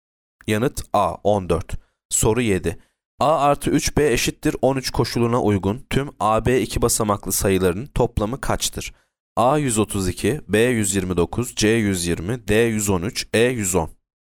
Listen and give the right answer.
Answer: Yanıt B 129.